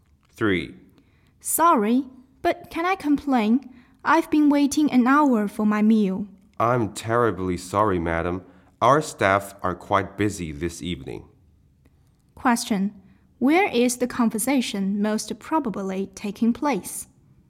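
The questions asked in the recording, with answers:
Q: Where is the conversation most probably taking place?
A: In a restaurant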